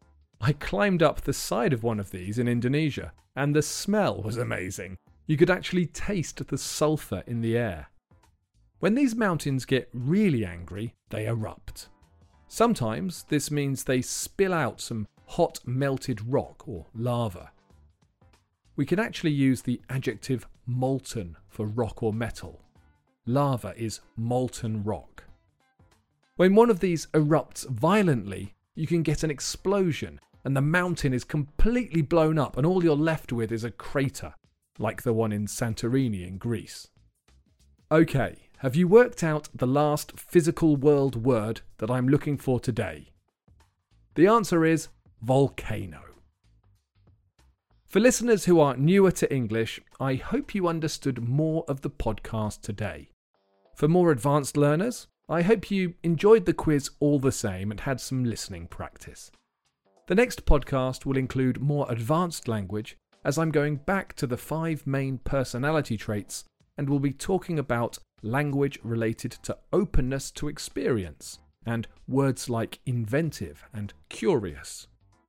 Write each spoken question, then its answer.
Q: Have you worked out the last physical world word that I'm looking for today?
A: The answer is volcano.